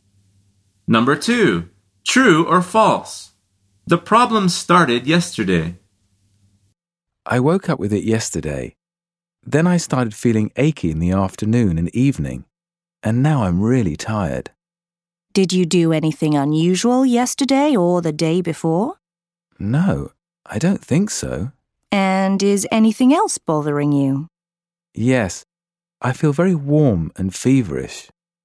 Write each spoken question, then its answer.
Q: True or false? The problem started yesterday.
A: The answer is true.